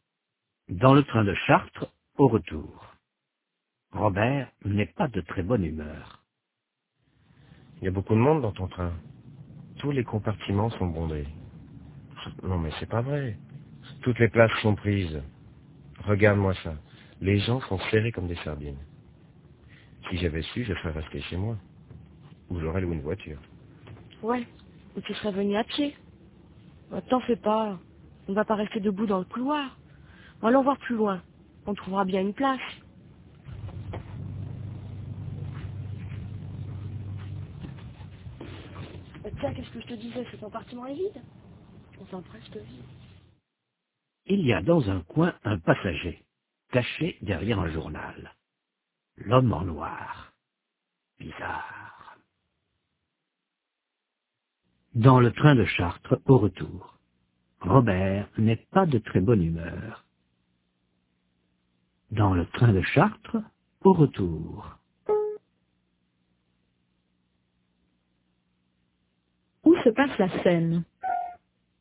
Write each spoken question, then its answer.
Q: Où se passe la scène?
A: Dans le train de Chartres, au retour.